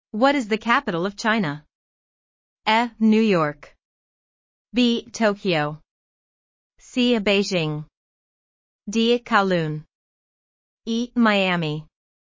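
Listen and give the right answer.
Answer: C: Beijing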